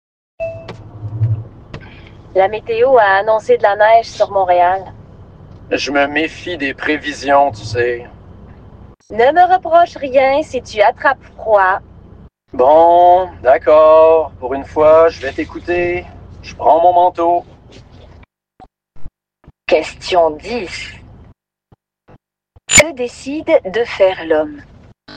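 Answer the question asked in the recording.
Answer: Prendre son manteau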